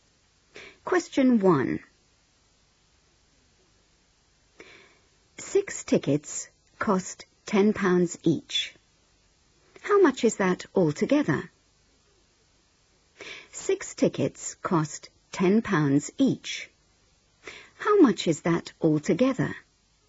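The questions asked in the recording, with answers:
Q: 6 tickets cost £10 each. How much is that altogether?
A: £60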